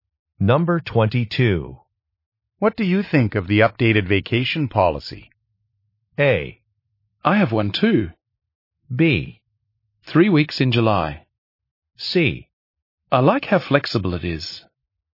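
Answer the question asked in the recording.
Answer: C: I like how flexible it is.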